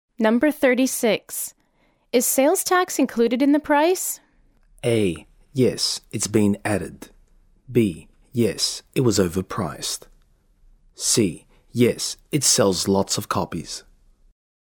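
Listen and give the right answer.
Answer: A: Yes, it's been added.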